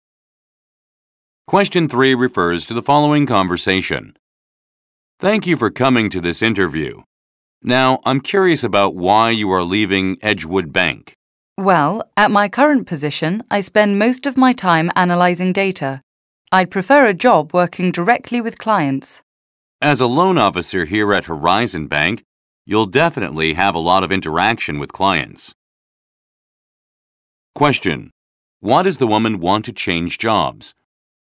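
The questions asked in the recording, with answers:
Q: Why does the woman want to change jobs?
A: She'd prefer a job working directly with clients.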